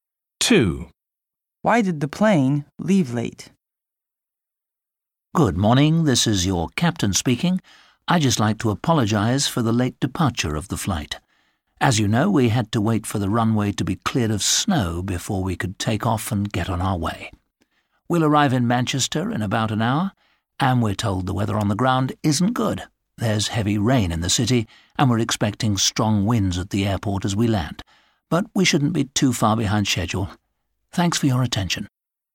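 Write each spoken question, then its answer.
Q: Why did the plane leave late?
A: because of snow on the runway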